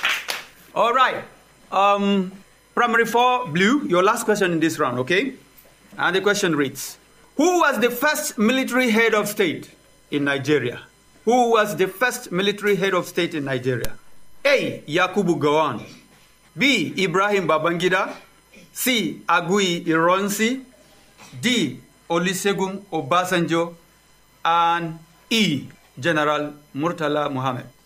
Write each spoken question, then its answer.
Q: who was the first military head of state in Nigeria?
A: C, General Agui Iranzi.